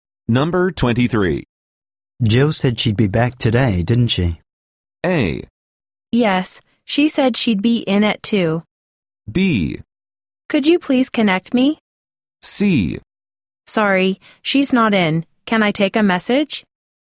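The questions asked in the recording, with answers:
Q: Jill said she'd be back today, didn't she?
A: A: Yes, she said she'd be in at 2.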